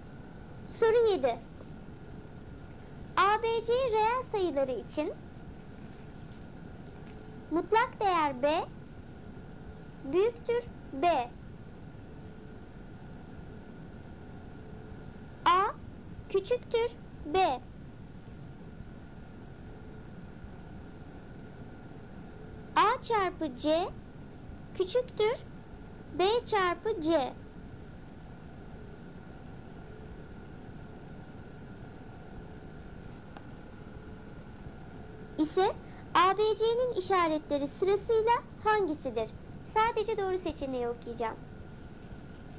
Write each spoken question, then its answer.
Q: İse ABC'nin işaretleri sırasıyla hangisidir?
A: Doğru cevap eksi, eksi, artı.